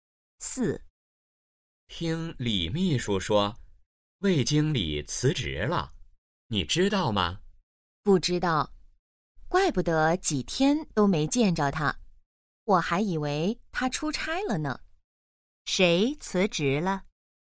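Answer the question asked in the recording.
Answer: 魏经理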